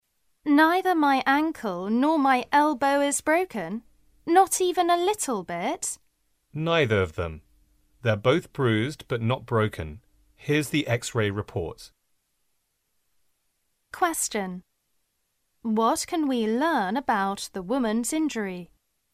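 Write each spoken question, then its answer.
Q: What can we learn about the woman's injury?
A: Her ankle and elbow are bruised but not broken.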